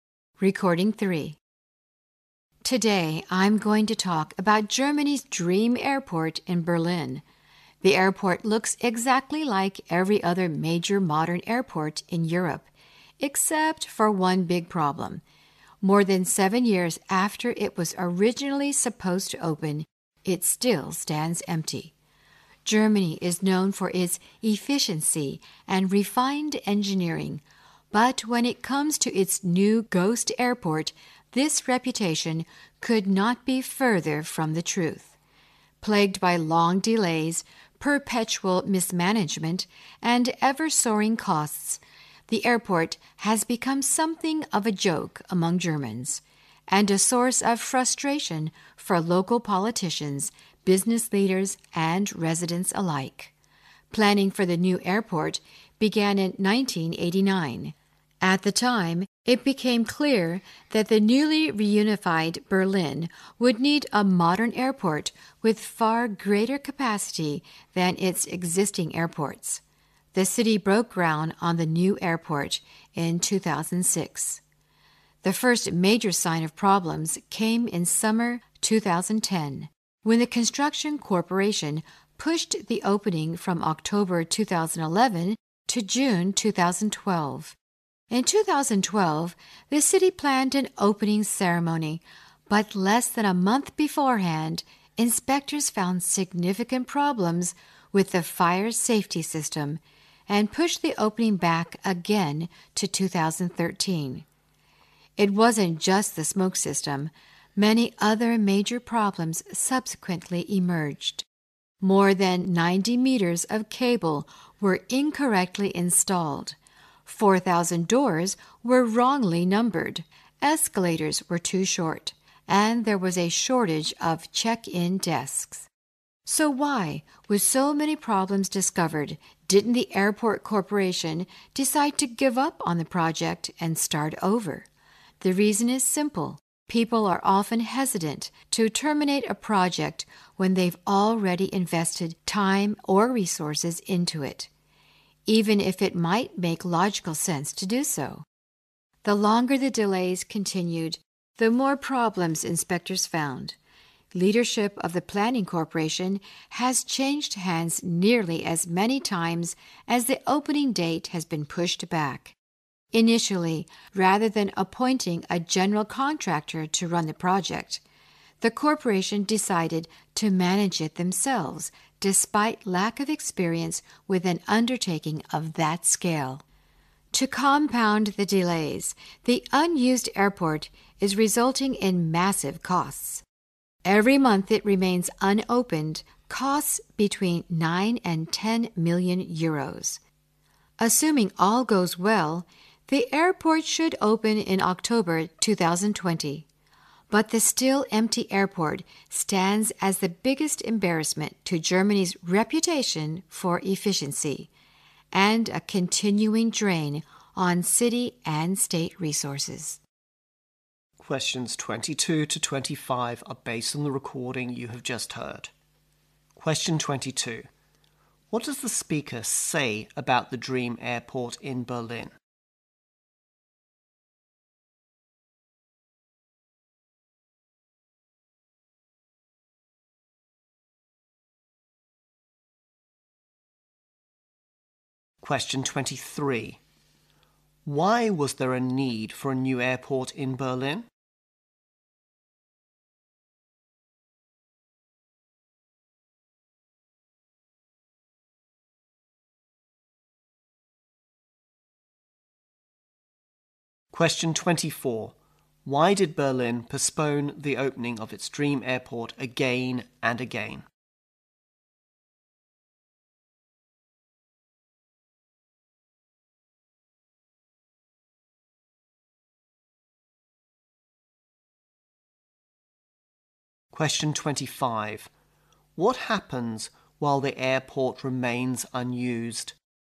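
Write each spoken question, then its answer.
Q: What does the speaker say about the dream airport in Berlin?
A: It still stands empty, more than seven years after it was supposed to open.

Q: Why was there a need for a new airport in Berlin?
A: The newly reunified Berlin needed an airport with far greater capacity.

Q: Why did Berlin postpone the opening of its dream airport again and again?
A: Inspectors kept finding problems, starting with the fire safety system.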